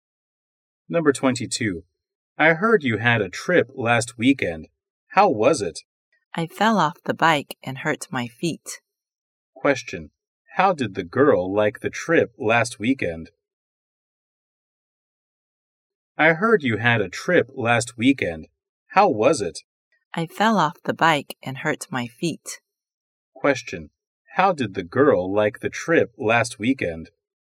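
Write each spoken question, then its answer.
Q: How did the girl like the trip last weekend?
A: Not good; she fell off the bike and hurt her feet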